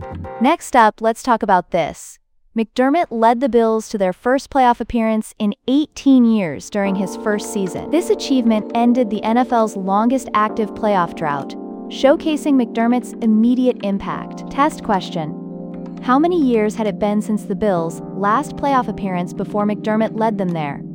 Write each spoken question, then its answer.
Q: How many years had it been since the Bills' last playoff appearance before McDermott led them there?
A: Correct answer, 18 years.